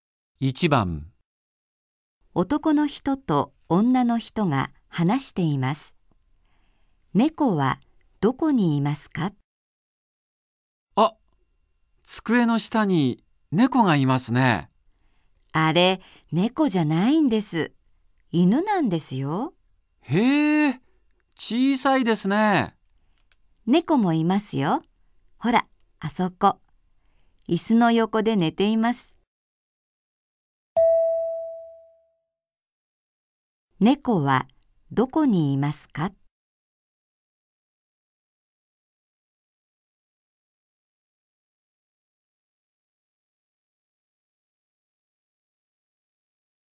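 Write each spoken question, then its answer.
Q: 猫はどこにいますか?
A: 椅子の横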